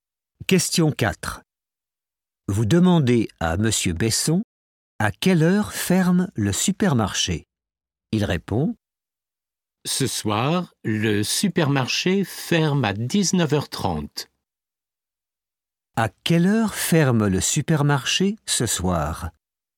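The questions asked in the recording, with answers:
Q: À quelle heure ferme le supermarché ce soir?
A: à 19h30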